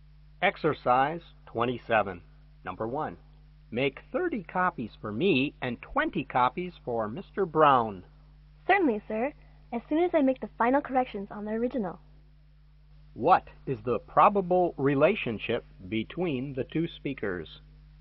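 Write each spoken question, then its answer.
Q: What is the probable relationship between the two speakers?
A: Boss and secretary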